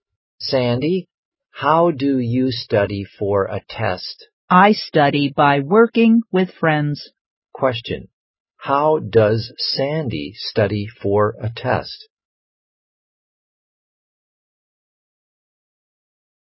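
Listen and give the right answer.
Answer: By working with friends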